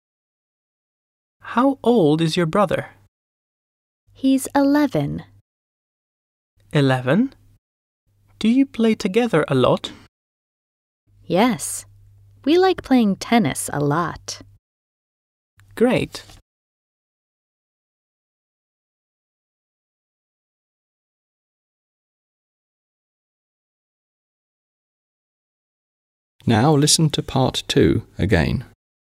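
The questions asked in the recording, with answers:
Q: How old is your brother?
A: 11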